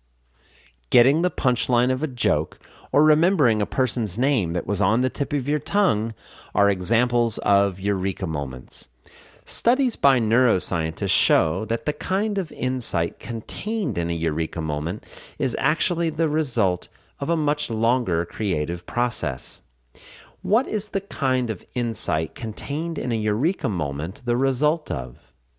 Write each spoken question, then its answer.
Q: What is the kind of insight contained in a eureka moment the result of?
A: The kind of insight contained in a eureka moment is actually the result of a much longer creative process.